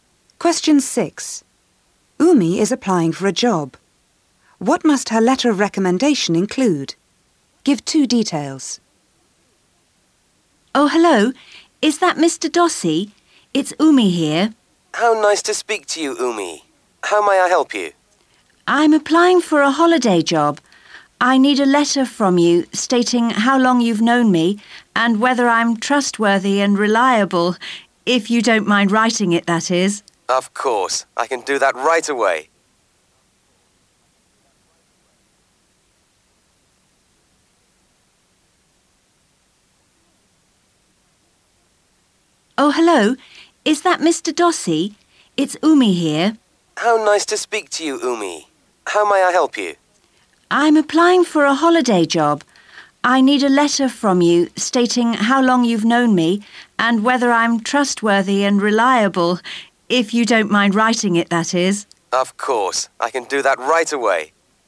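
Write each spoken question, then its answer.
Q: What must her letter of recommendation include?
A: How long he has known her, and whether she is trustworthy and reliable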